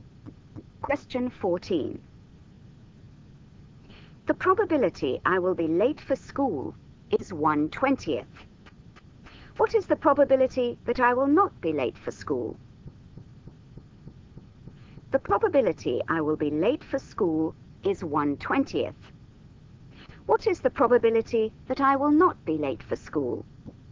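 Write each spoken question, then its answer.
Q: What is the probability that I will not be late for school?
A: 19/20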